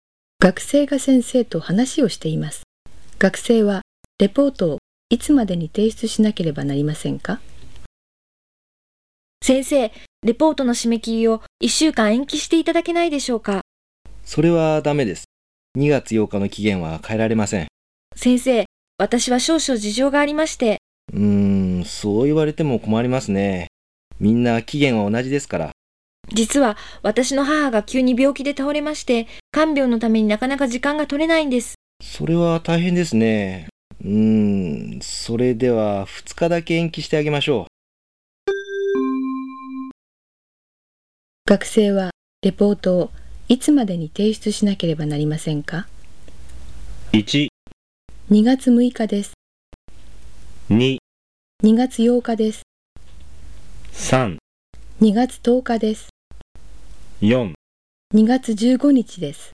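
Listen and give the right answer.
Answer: 3: 2月10日です。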